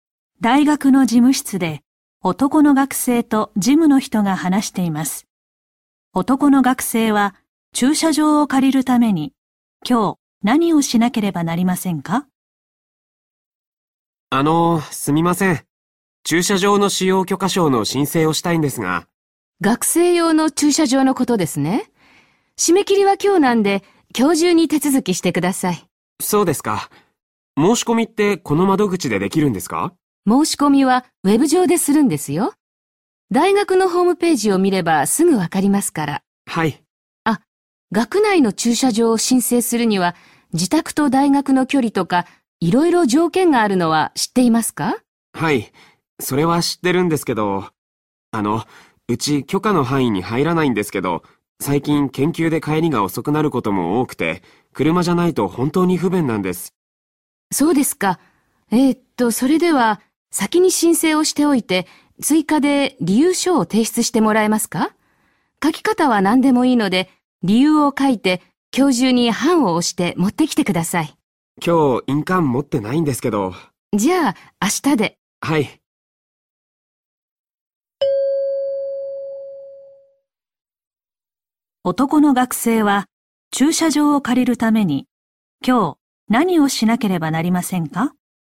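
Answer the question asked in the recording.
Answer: 大学のホームページ(ウェブ上)で駐車場の使用許可を申請する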